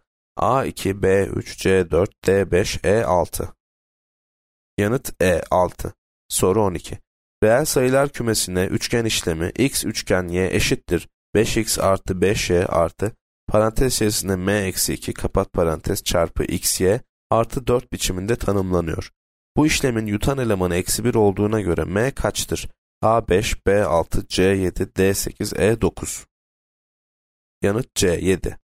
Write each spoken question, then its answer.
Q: Bu işlemin yutan elemanı eksi 1 olduğuna göre m kaçtır?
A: Yanıt C 7.